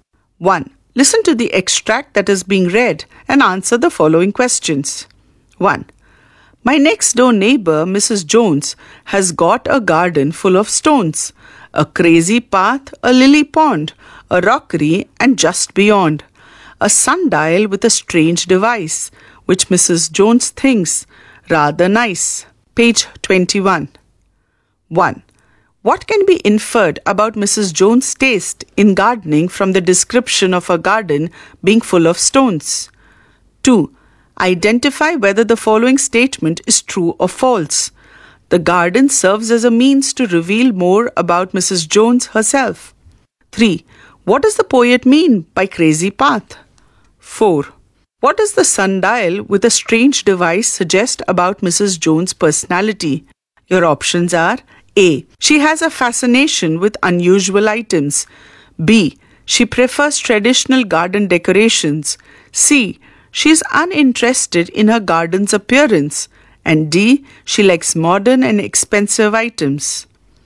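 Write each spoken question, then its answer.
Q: What does the sundial with a strange device suggest about Mrs. Jones' personality? Your options are A. She has a fascination with unusual items. B. She prefers traditional garden decorations. C. She is uninterested in her garden's appearance. And D. She likes modern and expensive items.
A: A: She has a fascination with unusual items.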